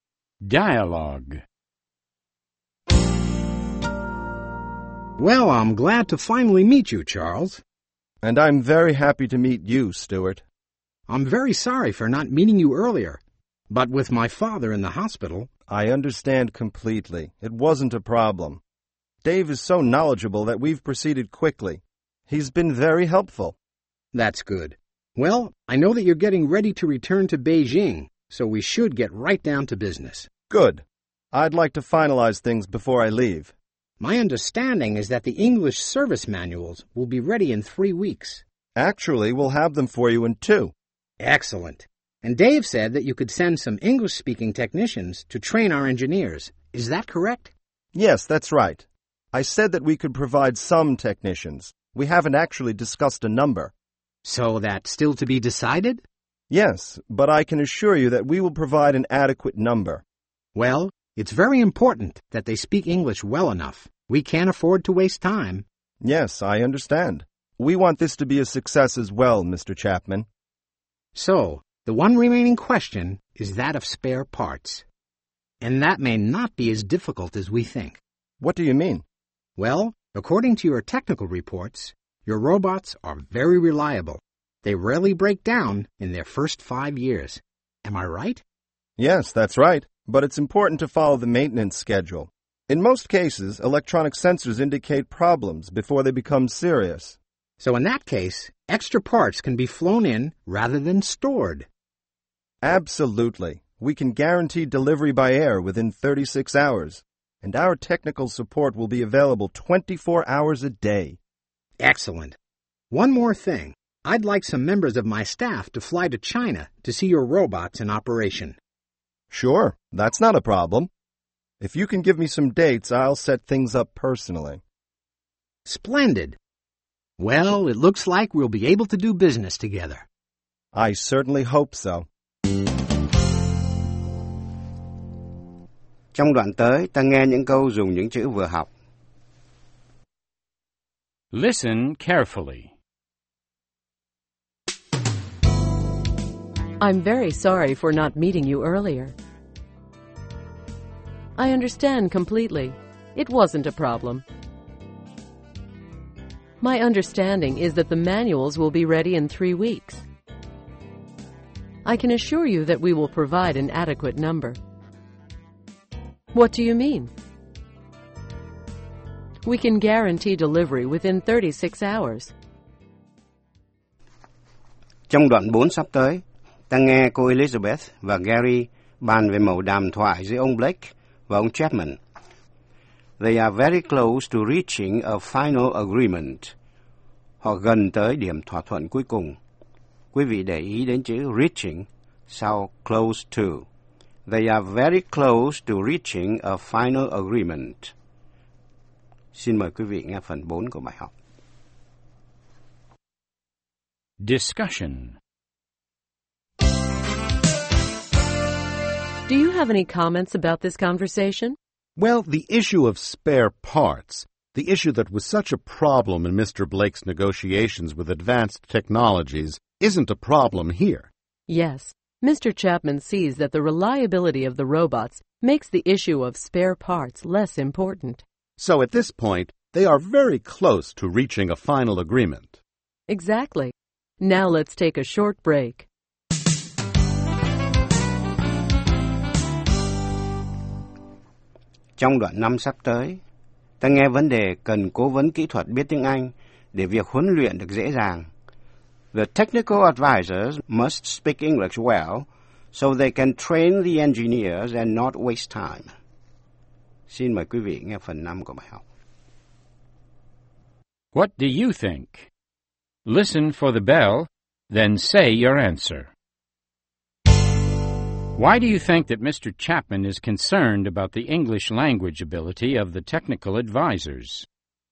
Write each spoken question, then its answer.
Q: Why do you think that Mr. Chapman is concerned about the English language ability of the technical advisors?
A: Well, for one thing, he thinks time will be wasted if the technical advisors don't speak English well enough.